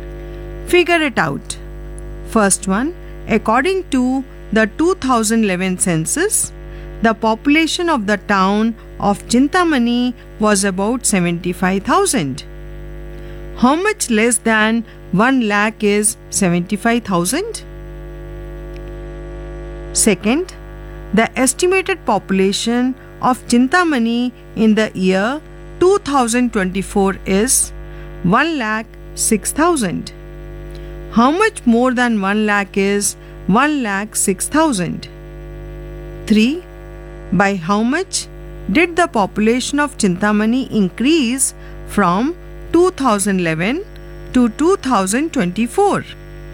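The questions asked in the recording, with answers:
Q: How much less than 1 lakh is 75,000?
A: 25,000

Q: How much more than 1 lakh is 1,06,000?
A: 6,000

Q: By how much did the population of Chintamani increase from 2011 to 2024?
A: 31,000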